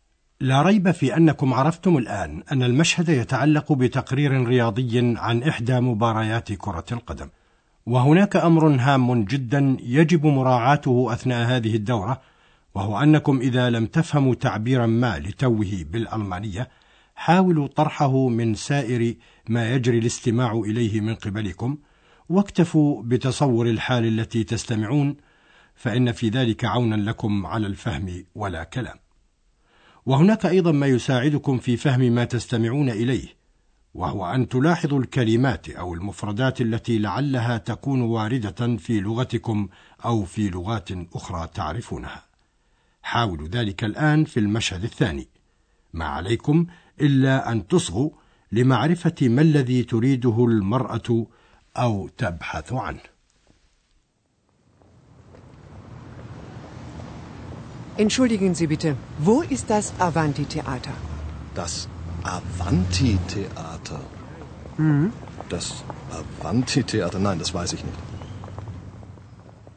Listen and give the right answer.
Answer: إنها تبحث عن مسرح أفنتي